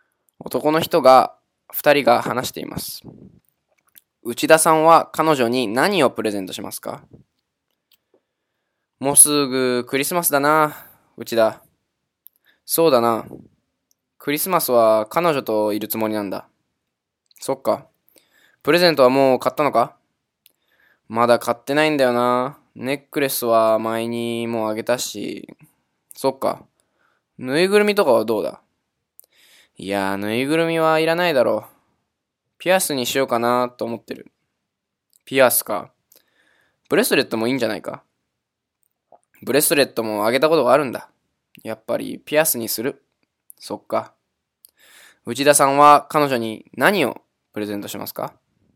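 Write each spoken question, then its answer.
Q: 内田さんは彼女に何をプレゼントしますか?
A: ピアス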